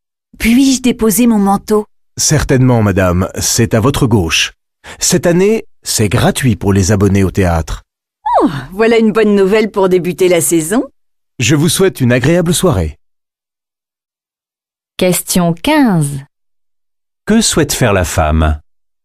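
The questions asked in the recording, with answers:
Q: Que souhaite faire la femme ?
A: Déposer son manteau (au vestiaire).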